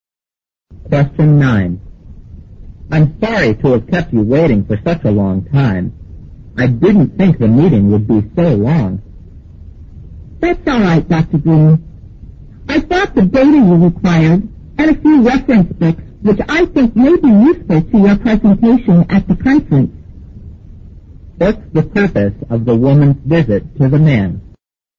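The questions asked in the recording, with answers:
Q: What's the purpose of the woman's visit to the man?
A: To bring him data and reference books for his conference presentation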